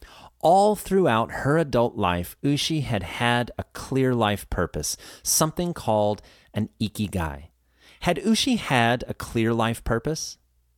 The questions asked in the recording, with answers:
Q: Had Ushi had a clear life purpose?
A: Yes, Ushi had had a clear life purpose.